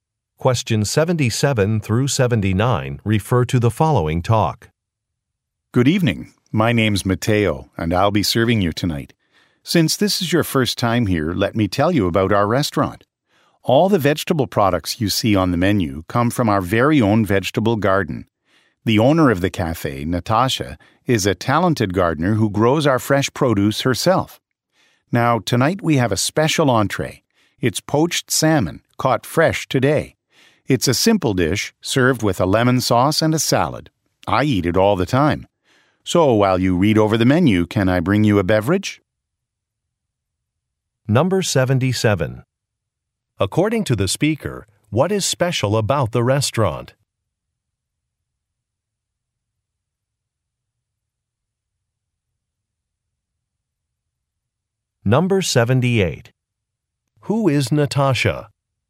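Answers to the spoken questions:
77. Its vegetables come from its own garden
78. The cafe owner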